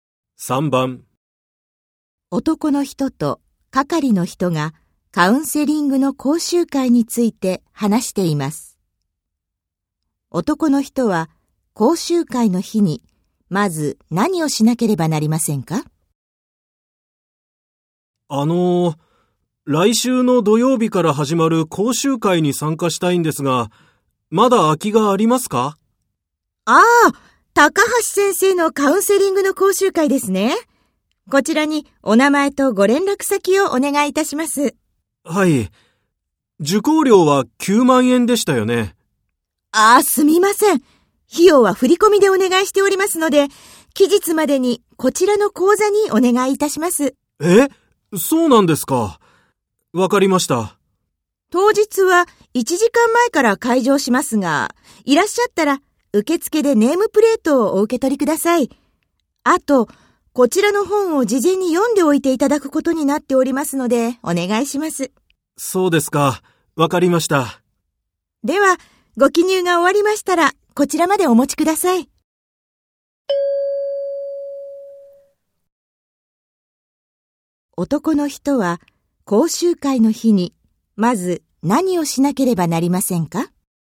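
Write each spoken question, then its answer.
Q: 男の人は、講習会の日に、まず何をしなければなりませんか?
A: 受付でネームプレートを受け取る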